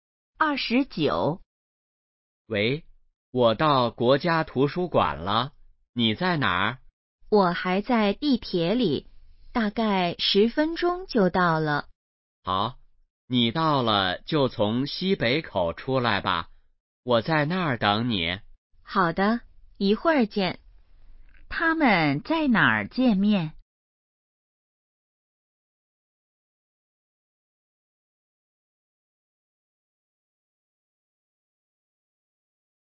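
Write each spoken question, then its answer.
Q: 他们在哪儿见面?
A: 国家图书馆西北口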